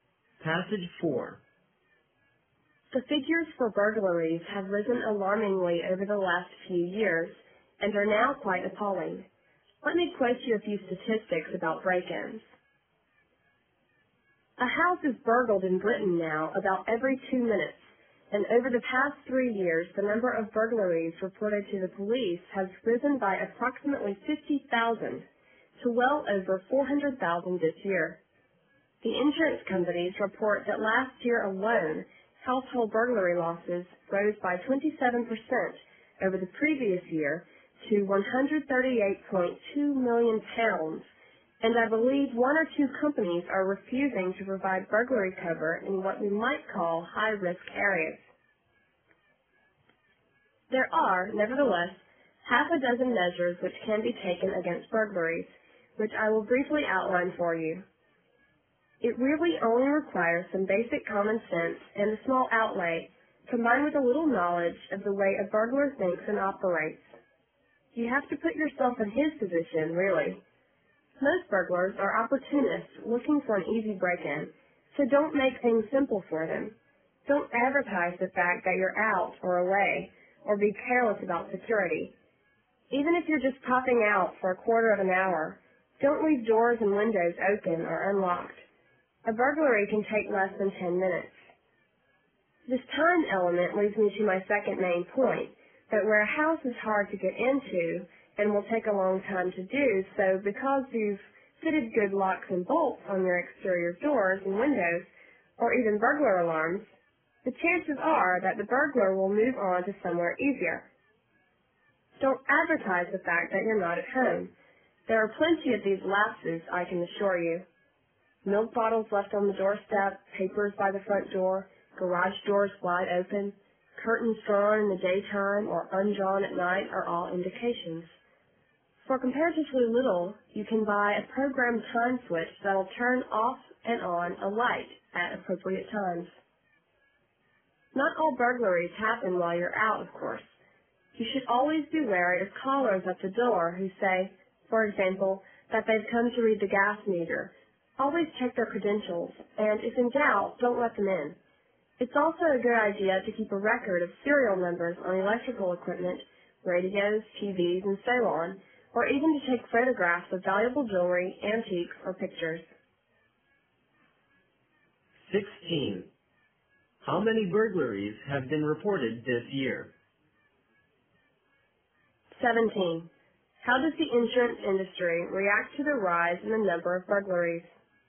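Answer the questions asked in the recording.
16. Well over 400,000
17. Some companies refuse burglary cover in high-risk areas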